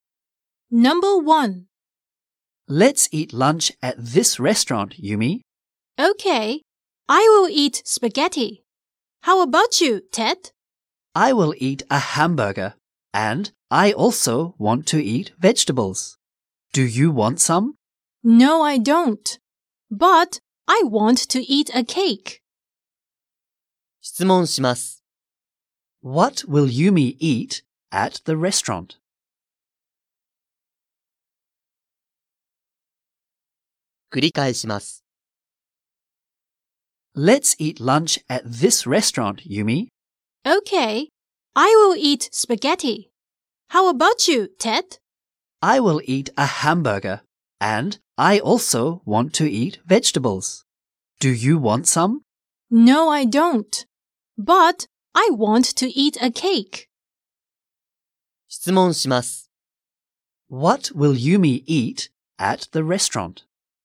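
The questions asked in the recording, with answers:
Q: What will Yumi eat at the restaurant?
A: Spaghetti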